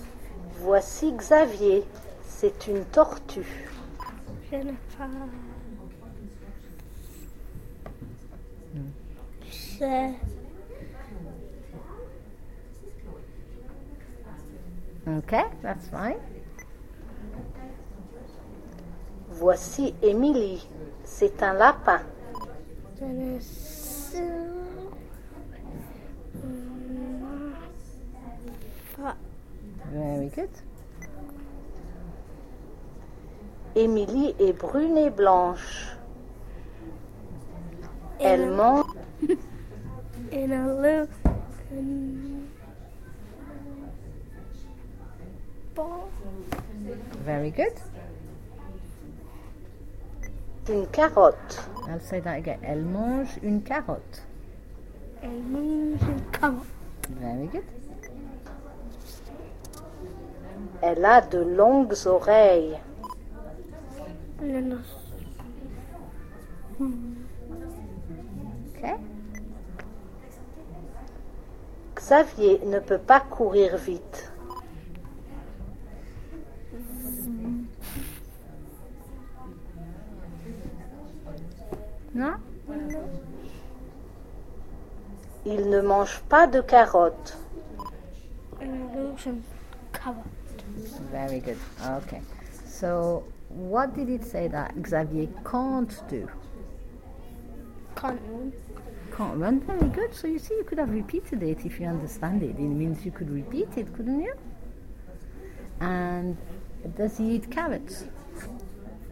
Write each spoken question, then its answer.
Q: And does he eat carrots?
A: No, very good.